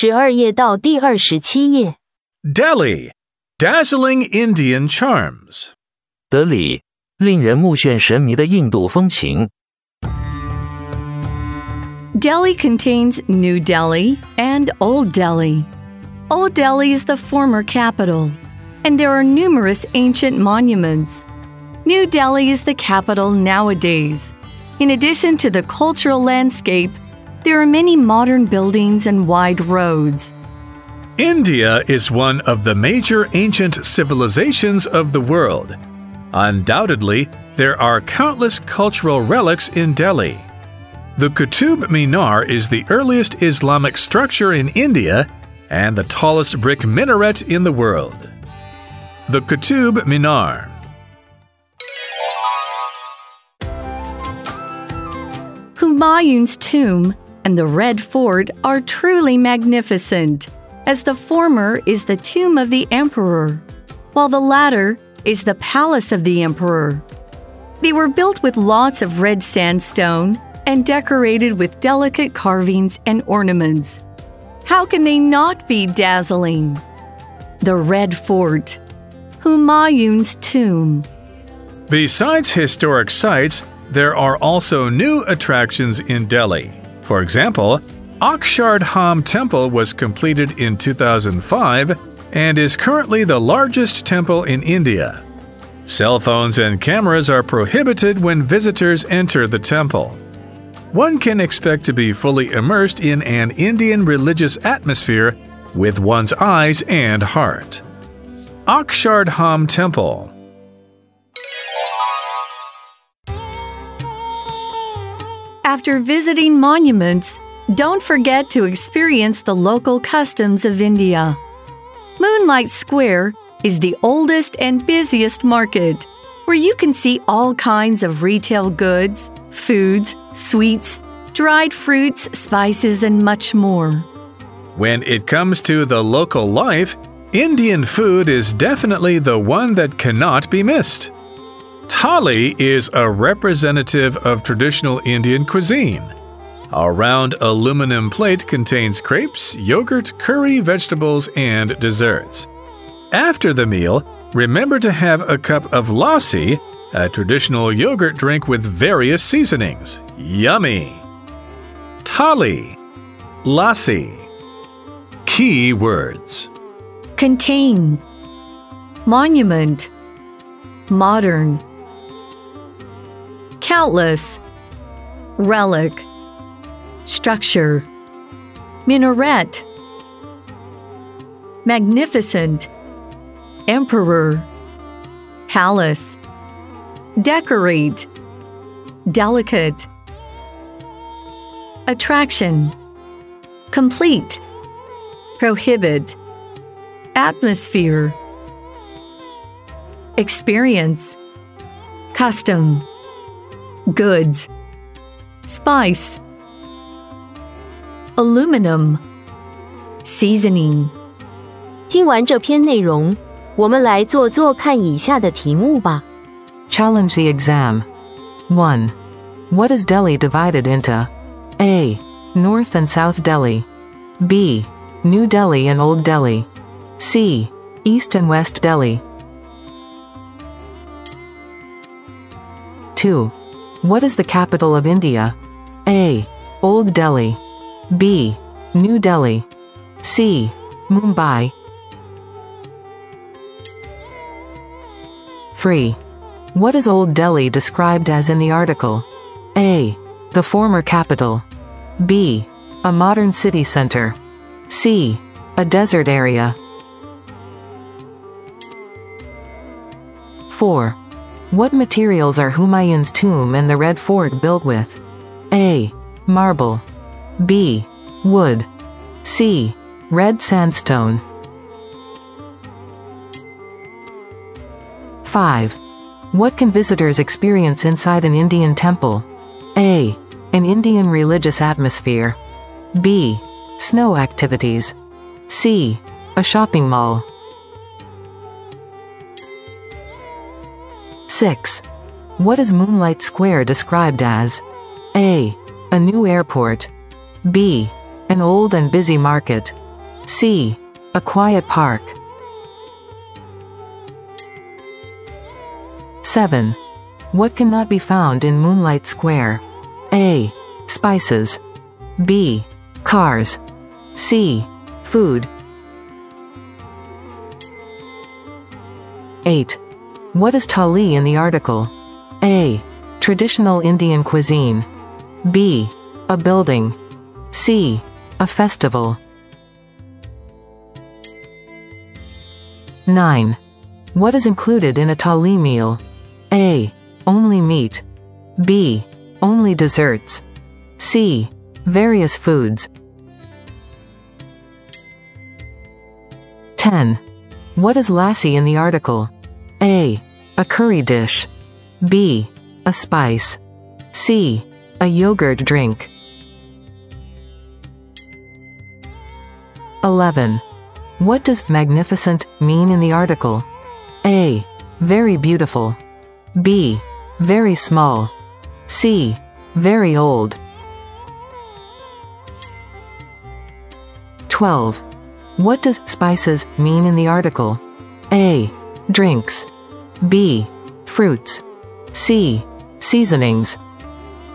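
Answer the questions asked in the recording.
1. B: New Delhi and Old Delhi.
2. B: New Delhi.
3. A: The former capital.
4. C: Red sandstone.
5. A: An Indian religious atmosphere.
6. B: An old and busy market.
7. B: Cars.
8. A: Traditional Indian cuisine.
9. C: Various foods.
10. C: A yogurt drink.
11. A: Very beautiful.
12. C: Seasonings.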